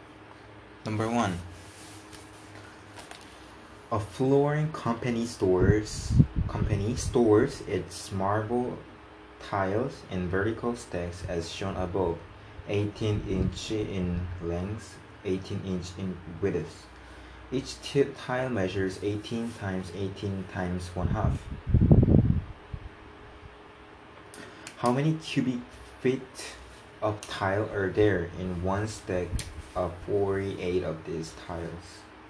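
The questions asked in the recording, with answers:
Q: How many cubic feet of tile are there in one stack of 48 of these tiles?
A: 4.5 cubic feet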